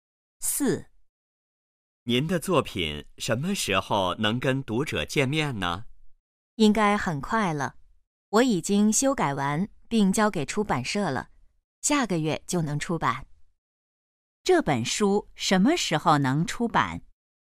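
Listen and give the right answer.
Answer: 下个月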